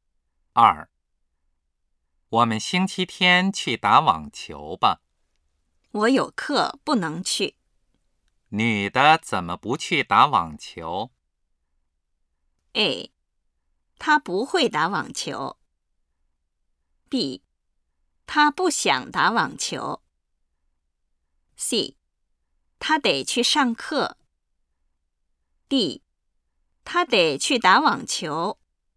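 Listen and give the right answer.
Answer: C: 她得去上课。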